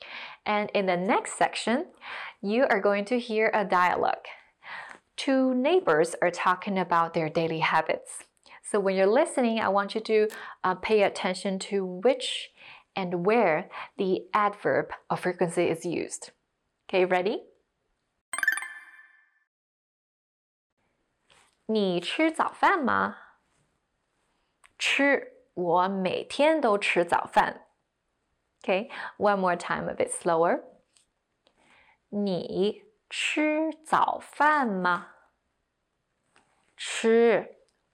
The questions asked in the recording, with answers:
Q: So when you're listening, I want you to pay attention to which and where the adverb of frequency is used.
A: Well, if you heard 每天都, you're right.